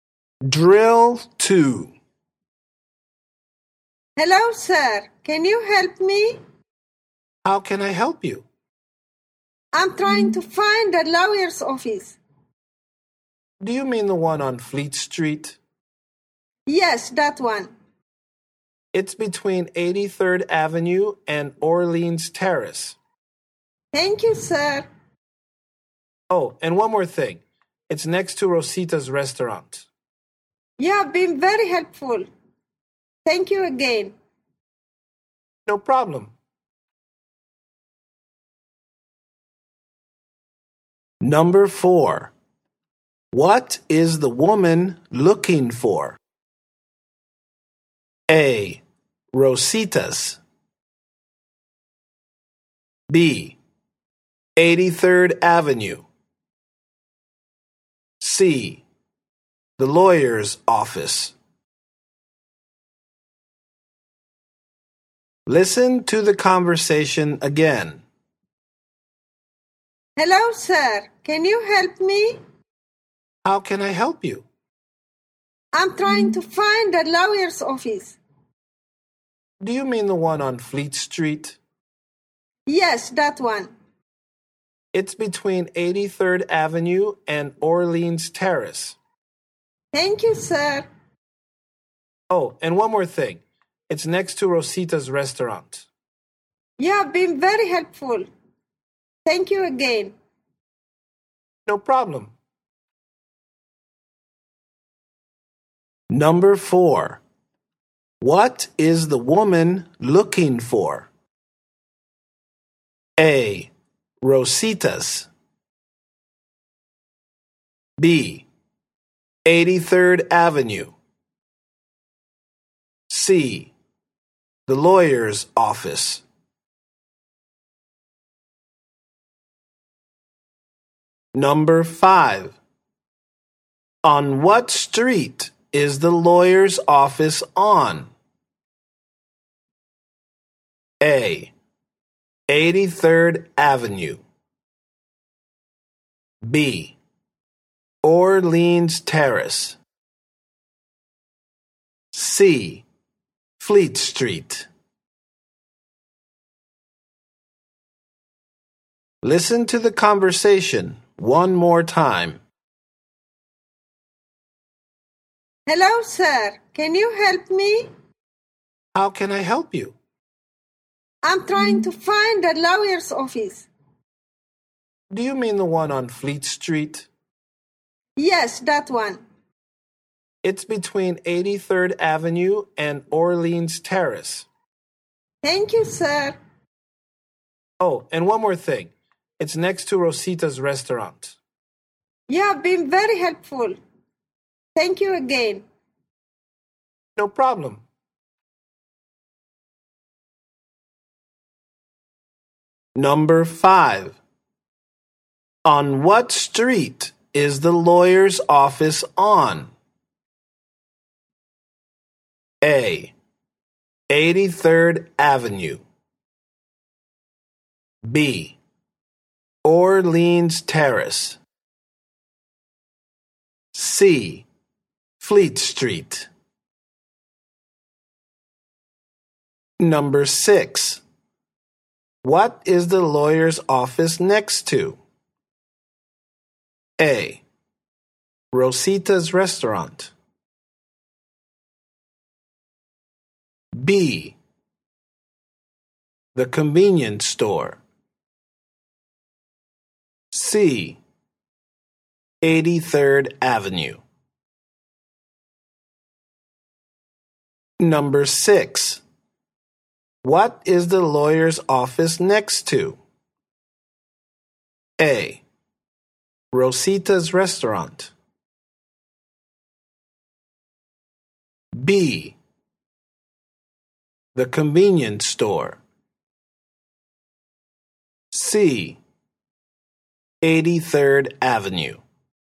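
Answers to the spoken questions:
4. C: The lawyer's office.
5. C: Fleet Street.
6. A: Rosita's Restaurant.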